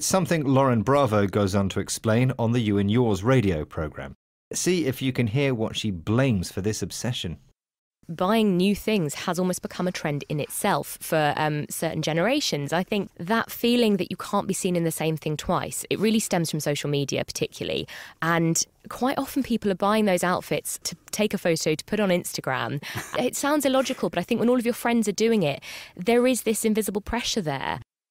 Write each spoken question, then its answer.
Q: See if you can hear what she blames for this obsession.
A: And this idea is caused by social media.